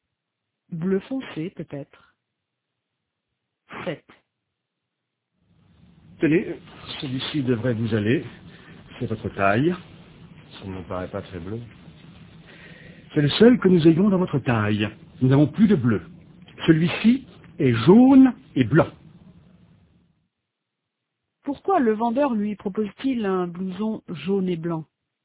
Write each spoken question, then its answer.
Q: Pourquoi le vendeur lui propose-t-il un blouson jaune et blanc?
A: Parce qu'ils n'ont plus de bleu.